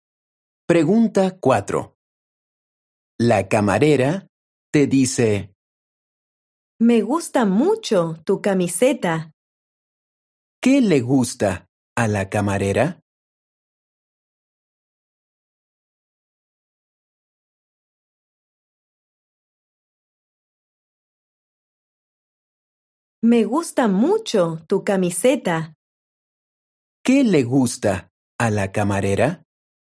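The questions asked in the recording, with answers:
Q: ¿Qué le gusta a la camarera?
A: tu camiseta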